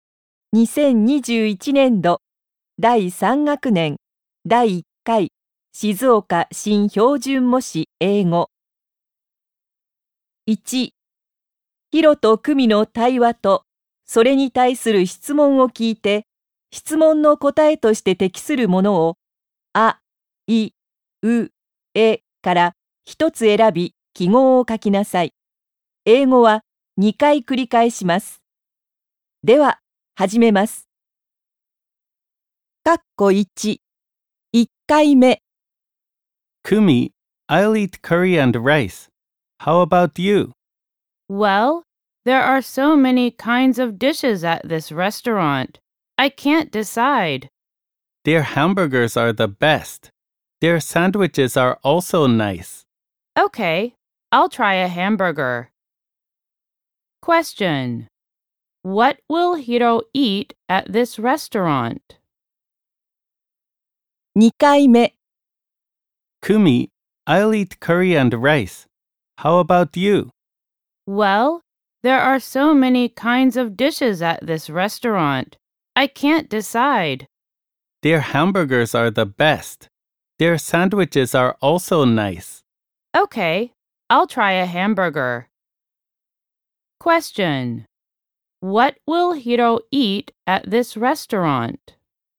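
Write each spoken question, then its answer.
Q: What will Hiro eat at this restaurant?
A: Curry and rice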